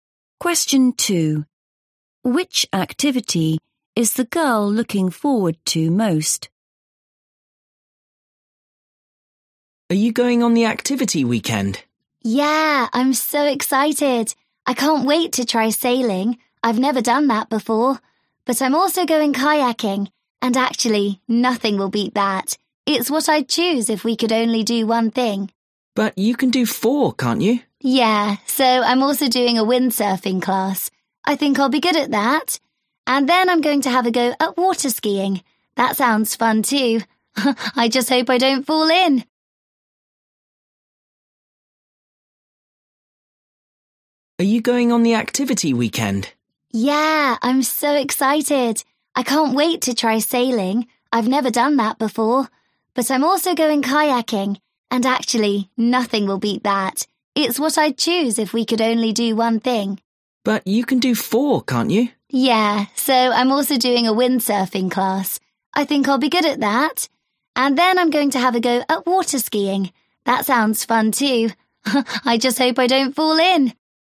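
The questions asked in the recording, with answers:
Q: Which activity is the girl looking forward to most?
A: Kayaking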